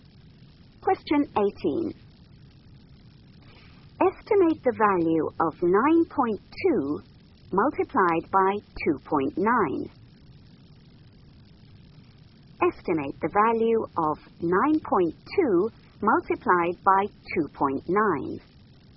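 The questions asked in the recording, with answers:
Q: Estimate the value of 9.2 multiplied by 2.9.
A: about 27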